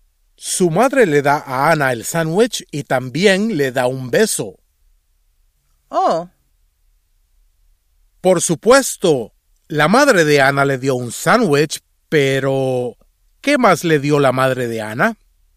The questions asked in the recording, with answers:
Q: Por supuesto, la madre de Ana le dio un sándwich, pero ¿qué más le dio la madre de Ana?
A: Su madre también le dio un beso.